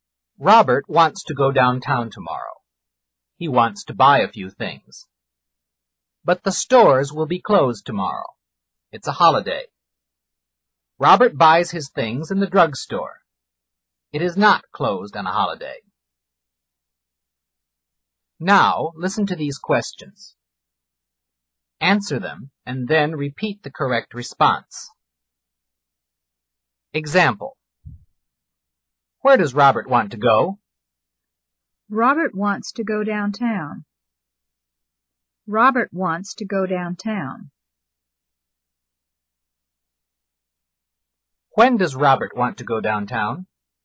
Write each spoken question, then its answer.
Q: When does Robert want to go downtown?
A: Robert wants to go downtown tomorrow.